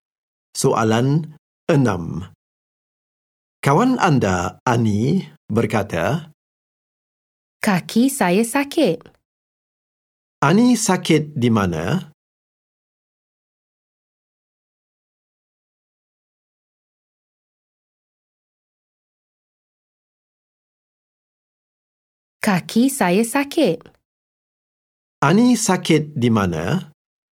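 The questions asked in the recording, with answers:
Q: Ani sakit di mana?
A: Kaki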